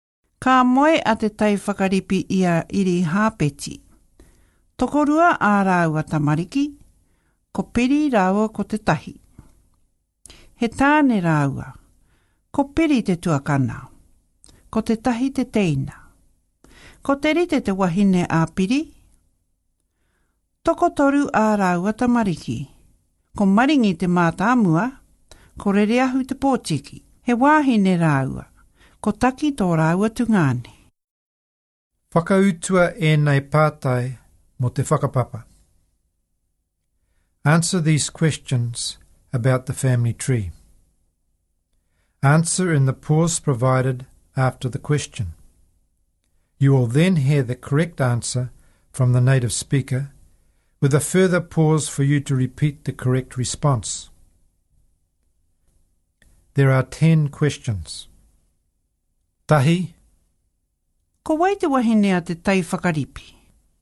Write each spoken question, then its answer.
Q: Ko wai te wahine a te tai whakaripi?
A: Ko iri hāpeti tana wahine.